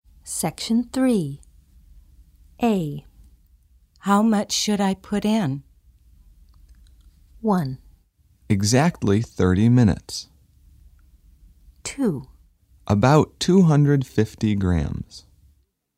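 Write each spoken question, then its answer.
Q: How much should I put in?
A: 2: About 250 grams.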